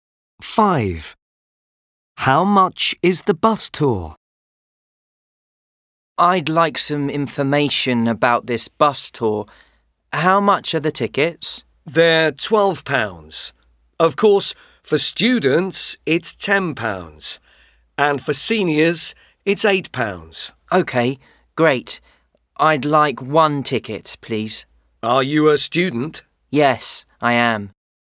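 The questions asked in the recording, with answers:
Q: How much is the bus tour?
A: £10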